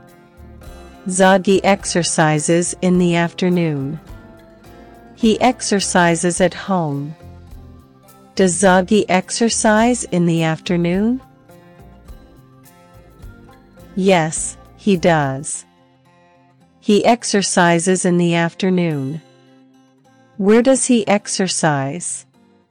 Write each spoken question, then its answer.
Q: Where does he exercise?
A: At home. He exercises at home.